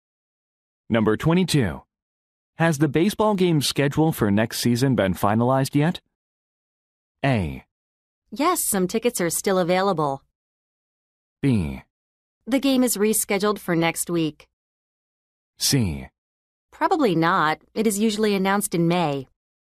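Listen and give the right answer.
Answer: C: Probably not. It is usually announced in May.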